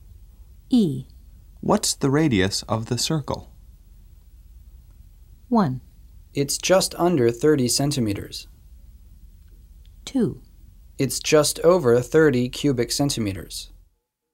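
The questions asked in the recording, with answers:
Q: What's the radius of the circle?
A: 1: It's just under 30 centimeters.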